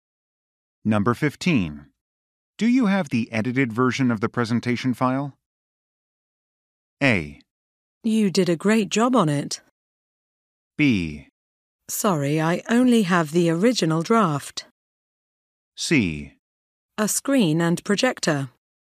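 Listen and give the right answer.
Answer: B: Sorry, I only have the original draft.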